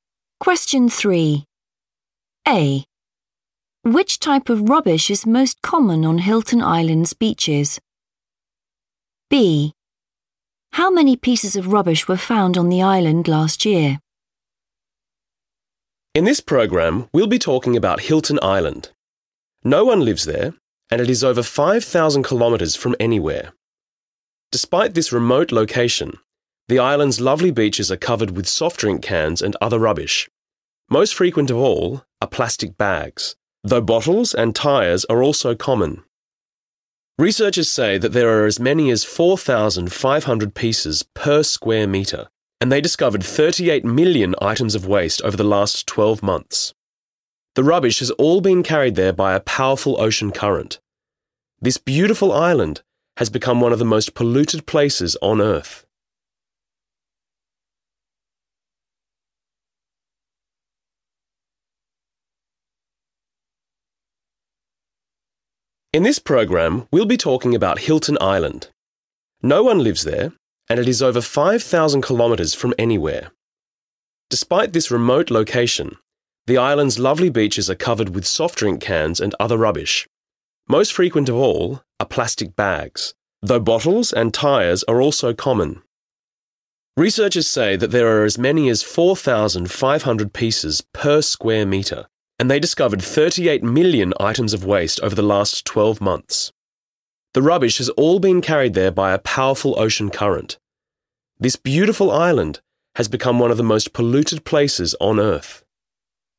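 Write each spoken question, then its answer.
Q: Which type of rubbish is most common on Hilton Island's beaches?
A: plastic bags

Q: How many pieces of rubbish were found on the island last year?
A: 38 million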